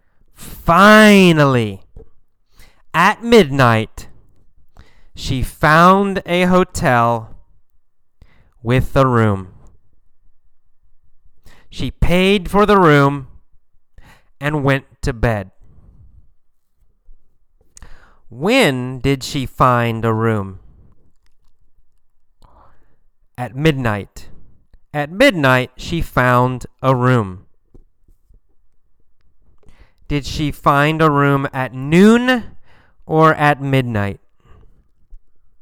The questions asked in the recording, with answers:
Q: Did she find a room at noon or at midnight?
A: Not at noon. She found a room at midnight.